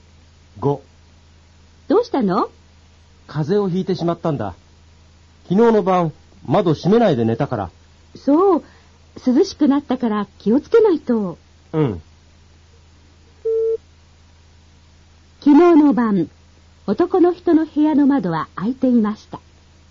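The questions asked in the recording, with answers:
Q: 昨日の晩、男の人の部屋の窓は開いていました。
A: 正しい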